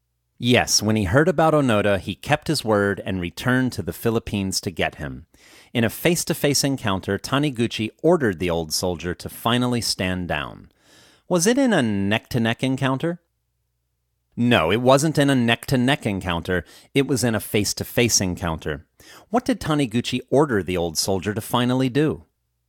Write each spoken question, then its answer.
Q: What did Taniguchi order the old soldier to finally do?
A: Taniguchi ordered the old soldier to finally stand down.